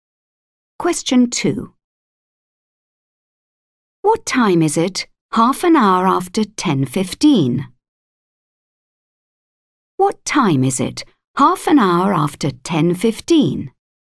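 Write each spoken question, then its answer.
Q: What time is it 1/2 hour after 10:15?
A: 10:45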